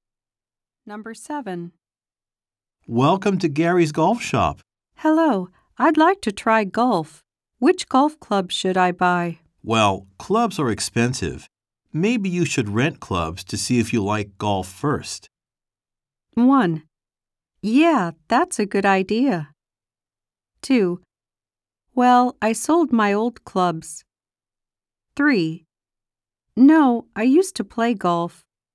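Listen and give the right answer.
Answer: 1: Yeah, that's a good idea.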